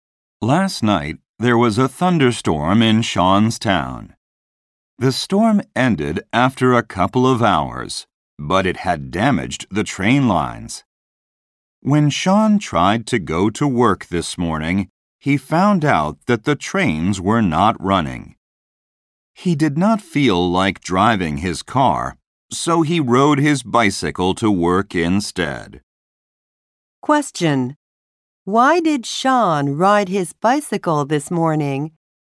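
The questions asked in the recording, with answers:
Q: Why did Sean ride his bicycle this morning?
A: The trains were not running because the storm damaged the train lines.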